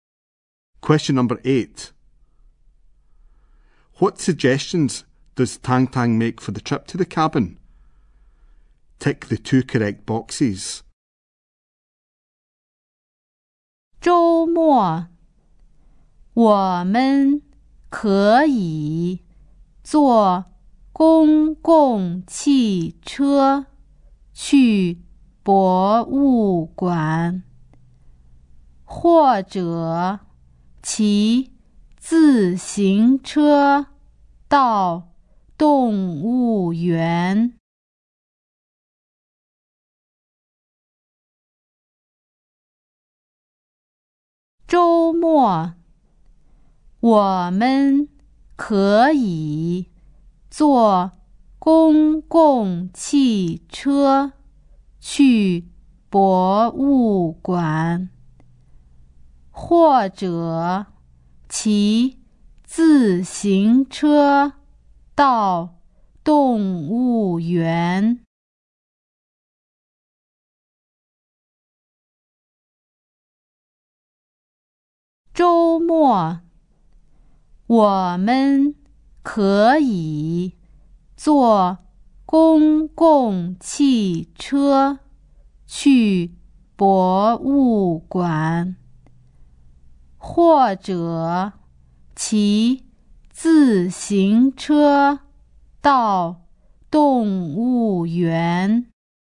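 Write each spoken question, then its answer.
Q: What suggestions does Tang Tang make for the trip to the cabin?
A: Take the bus to the museum, or cycle to the zoo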